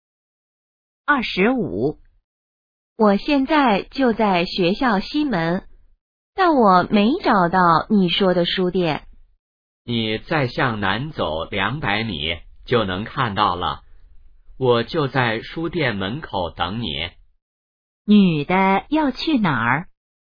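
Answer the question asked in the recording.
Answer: 书店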